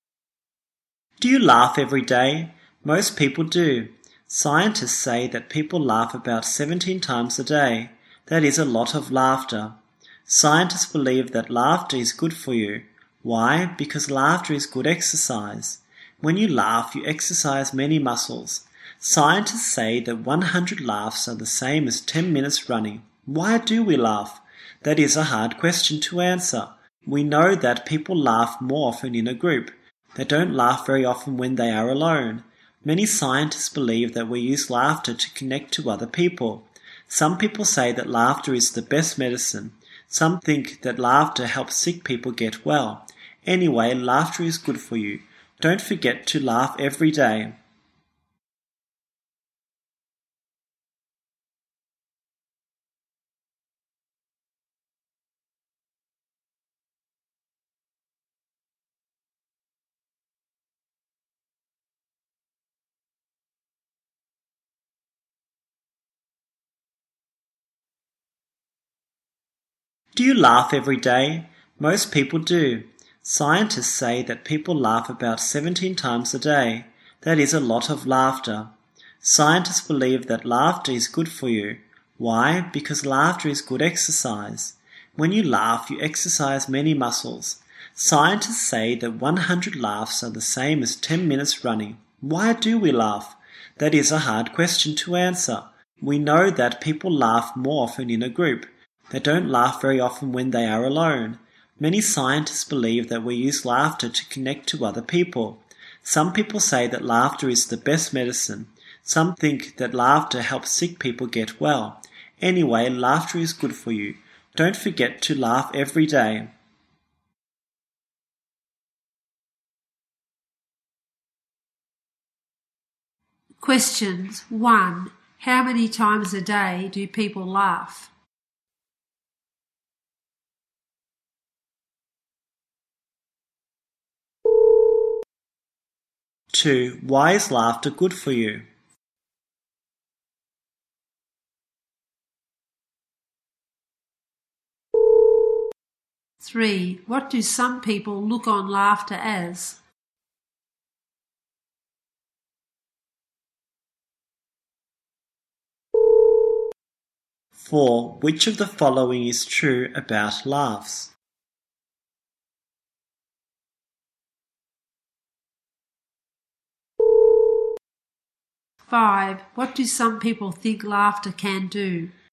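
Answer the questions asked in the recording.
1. About 17 times
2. Because laughter is good exercise
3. The best medicine
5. Help sick people get well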